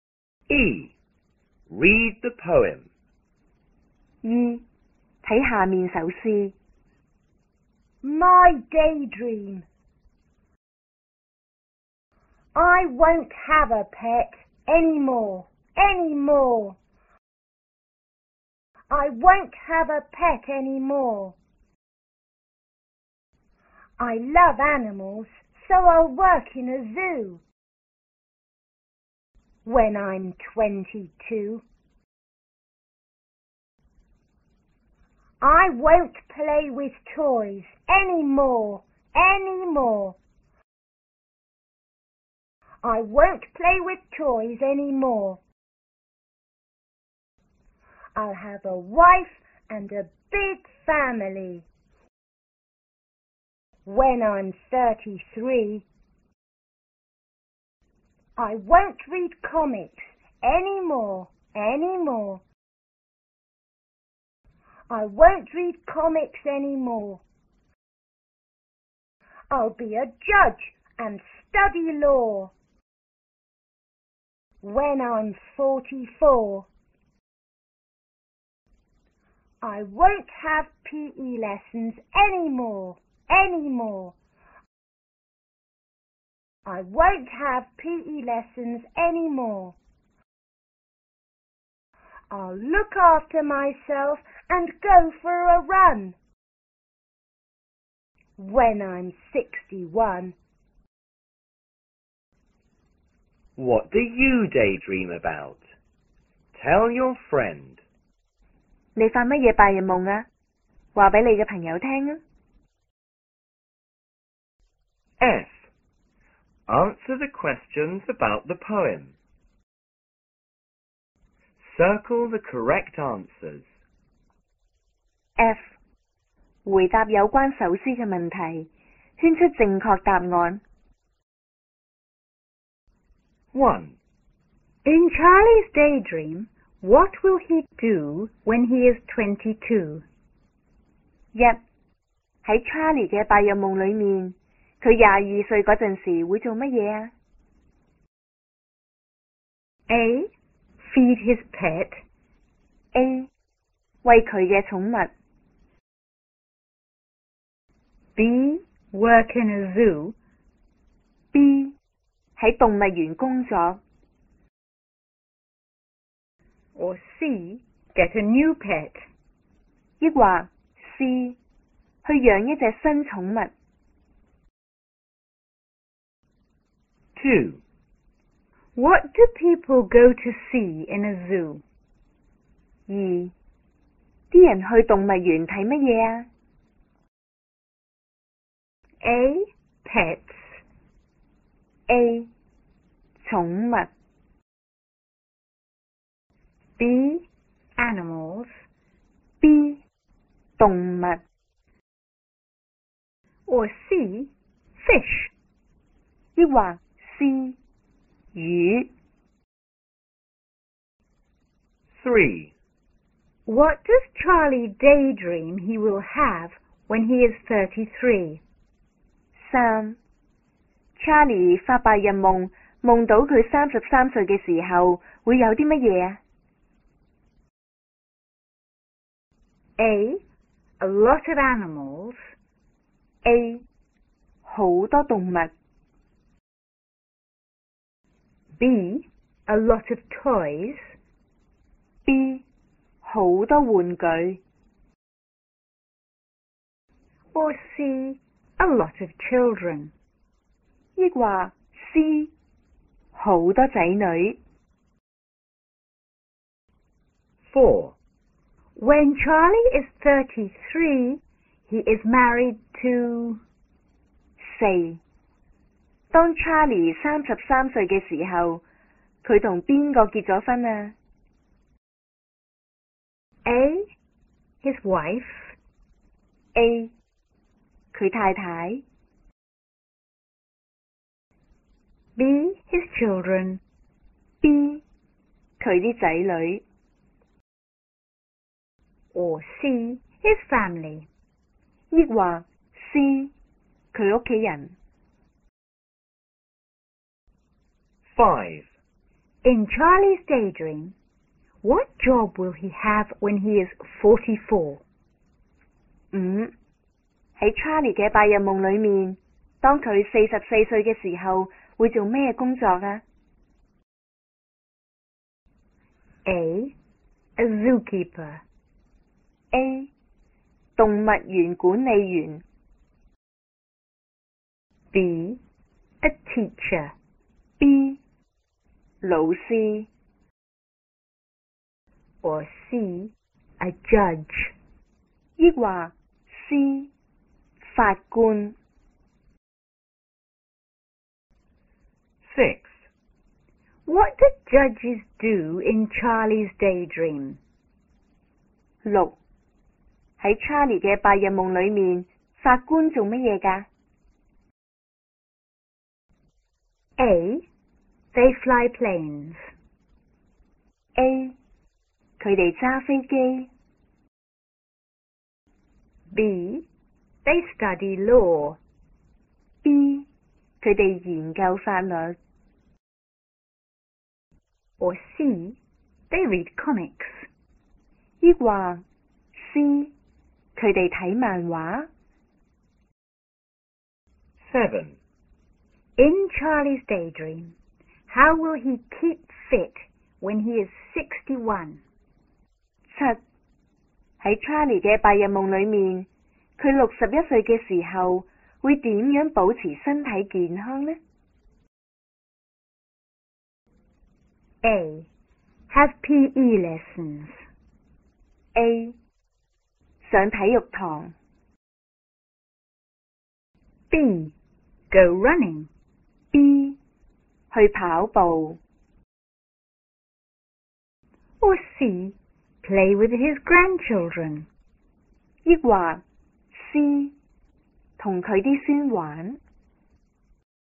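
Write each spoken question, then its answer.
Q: In Charlie's daydream, what will he do when he is 22?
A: B: Work in a zoo.

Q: What do people go to see in a zoo?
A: B: Animals.

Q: What does Charlie daydream he will have when he is 33?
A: C: A lot of children.

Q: When Charlie is 33, he is married to...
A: A: His wife.

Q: In Charlie's daydream, what job will he have when he is 44?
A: C: a judge.

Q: What do judges do in Charlie's daydream?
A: B: They study law.

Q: In Charlie's daydream,How will he keep fit when he is 61?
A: B: Go running.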